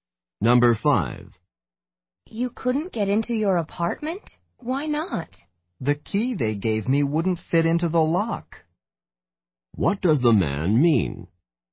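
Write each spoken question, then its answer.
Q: What does the man mean?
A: He was given the wrong key; it didn't fit the lock.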